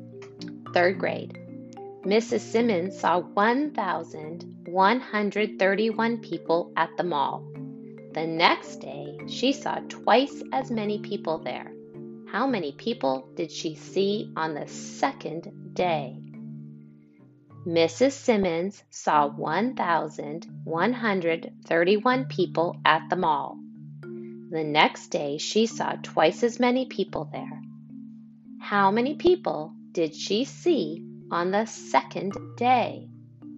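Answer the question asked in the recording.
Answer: 2,262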